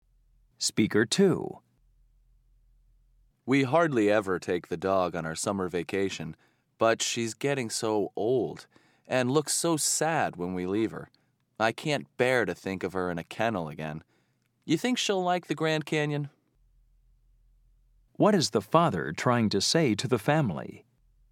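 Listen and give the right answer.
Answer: He wants to take the dog with them on vacation this time.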